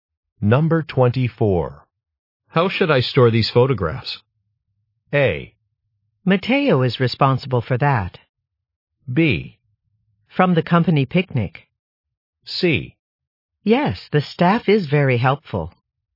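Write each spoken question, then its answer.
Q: How should I store these photographs?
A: A: Matteo is responsible for that.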